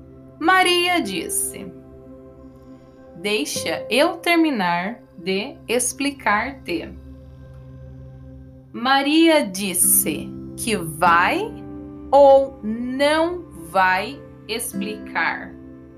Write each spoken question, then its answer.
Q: Maria disse que vai ou não vai explicar.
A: Ela disse que vai explicar para Carlota Joaquina.